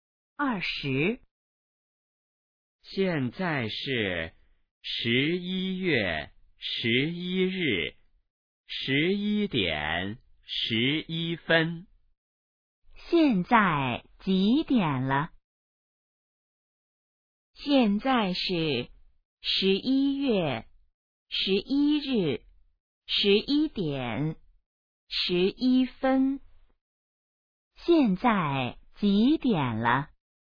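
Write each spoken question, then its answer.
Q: 现在几点了?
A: 11:11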